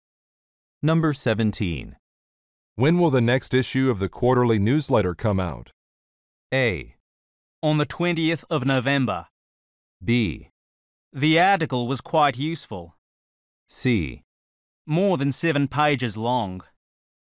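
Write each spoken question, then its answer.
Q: When will the next issue of the quarterly newsletter come out?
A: A: On the 20th of November.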